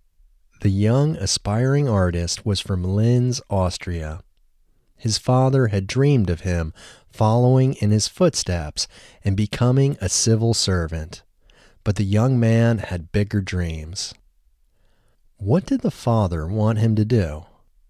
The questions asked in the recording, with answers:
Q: What did the father want him to do?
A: The father wanted him to follow in his footsteps and become a civil servant.